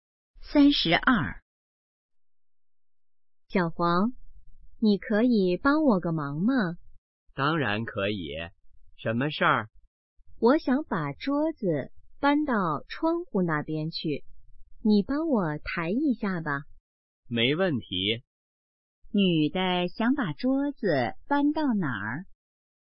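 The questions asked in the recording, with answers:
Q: 女的想把桌子搬到哪儿?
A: 窗户那边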